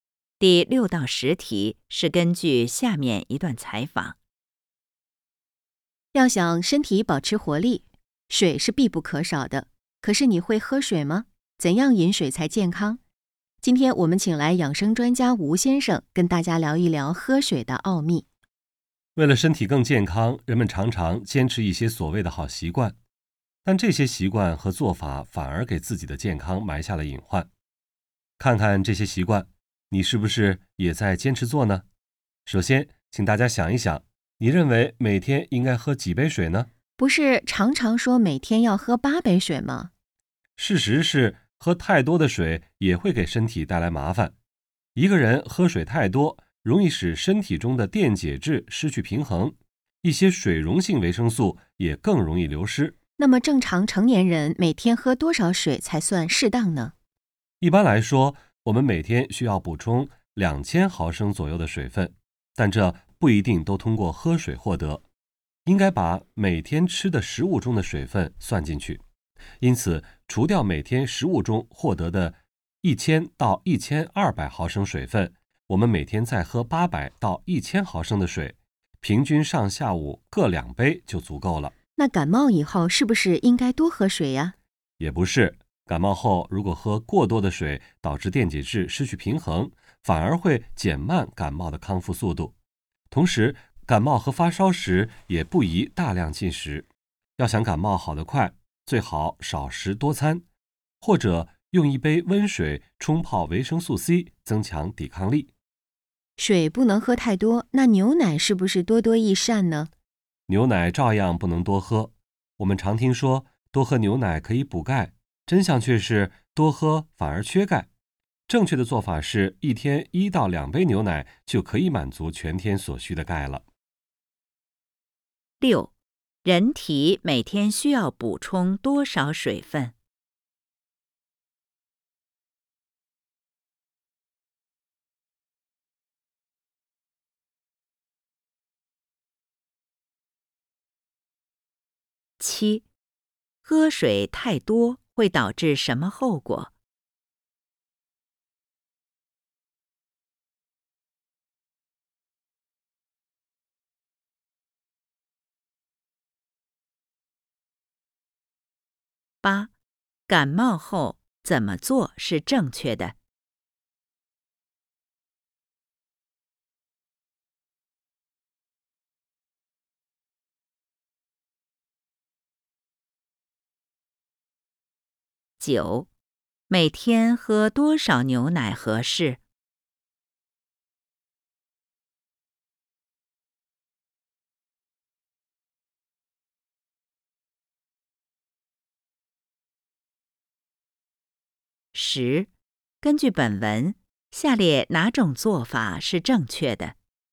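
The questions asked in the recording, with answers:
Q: 人体每天需要补充多少水分?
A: 2000毫升左右

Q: 喝水太多会导致什么后果?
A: 电解质失去平衡,水溶性维生素更容易流失

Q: 感冒后怎么做是正确的?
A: 少食多餐,或用温水冲泡维生素C

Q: 每天喝多少牛奶合适?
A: 1到2杯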